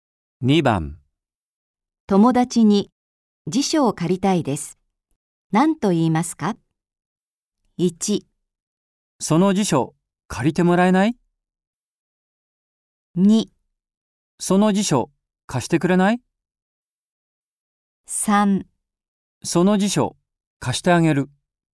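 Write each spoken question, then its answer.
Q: 友達に辞書を借りたいです。何と言いますか ?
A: 2: その辞書貸してくれない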